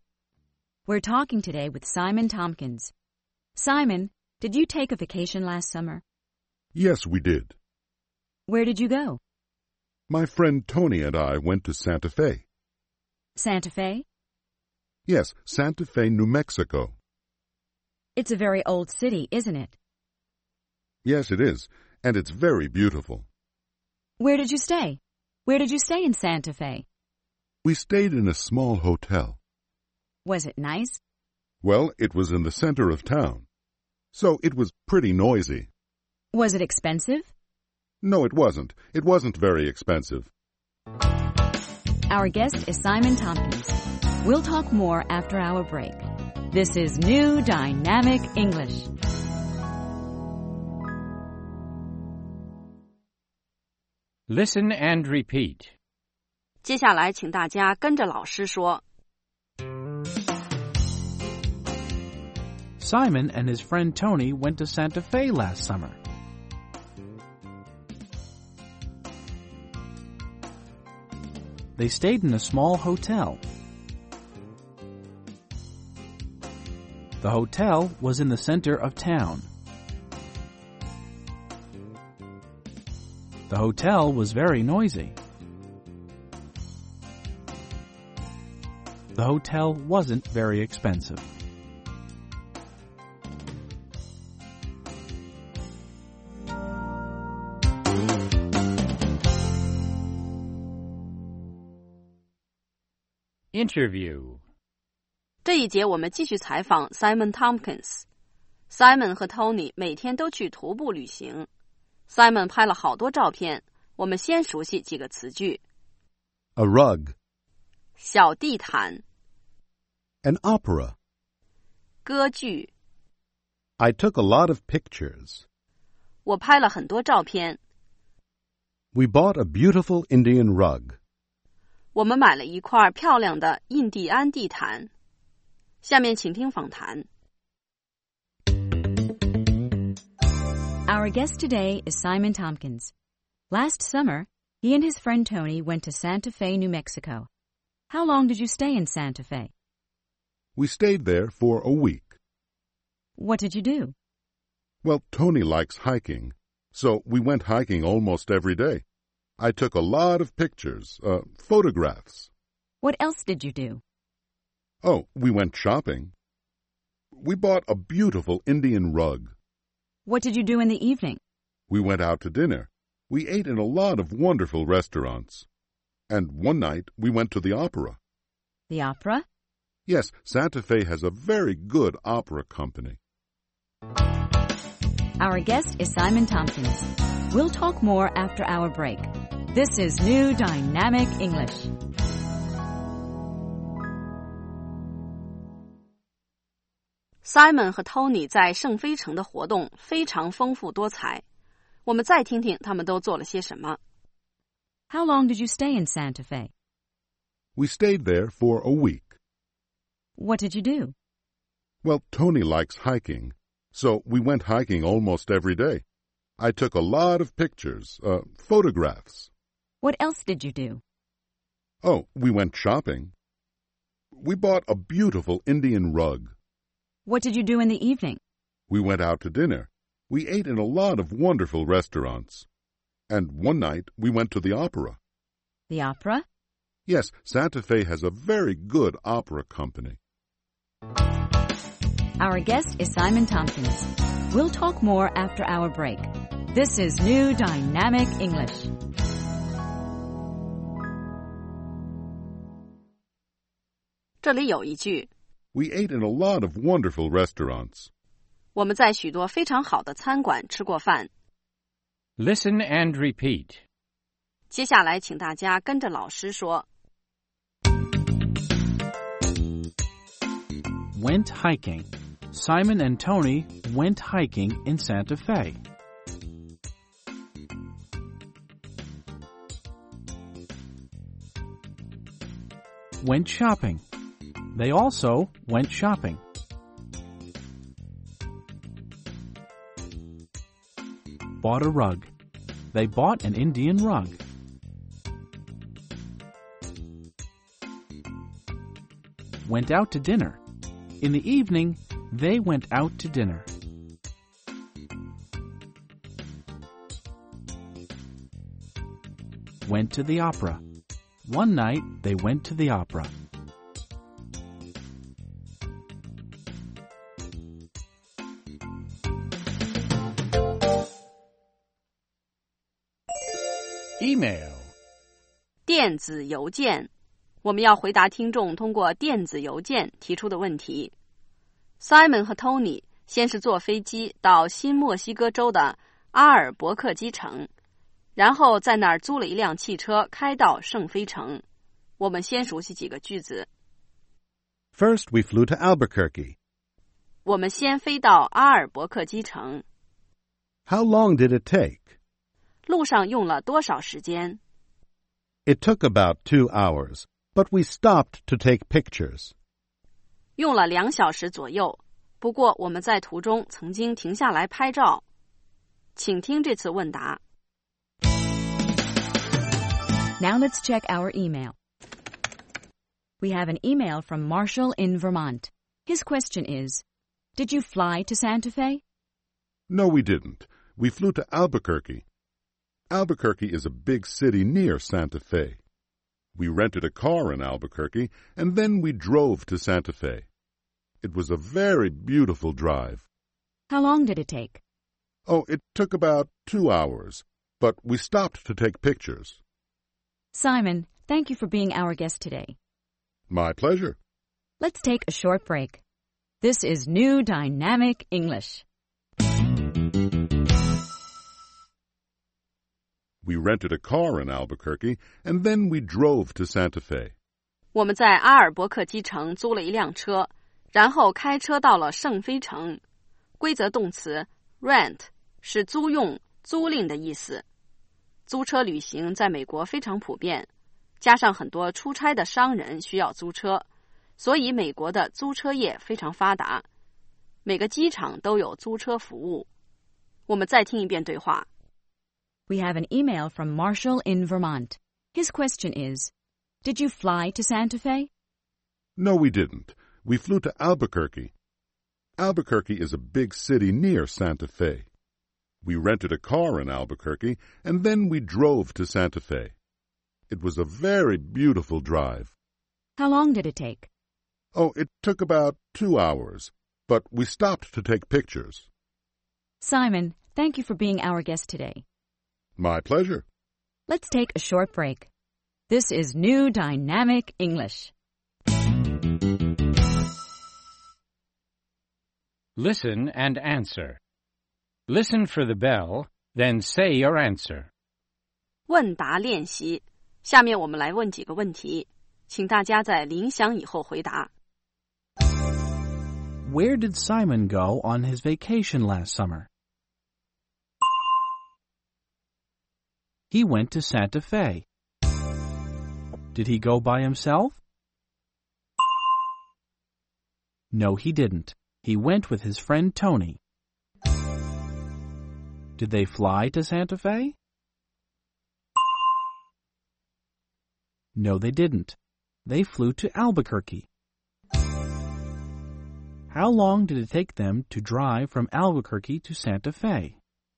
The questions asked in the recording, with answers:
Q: Where did Simon go on his vacation last summer?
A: He went to Santa Fe.

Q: Did he go by himself?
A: No, he didn't. He went with his friend Tony.

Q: How long did it take them to drive from Albuquerque to Santa Fe?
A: It took them 2 hours.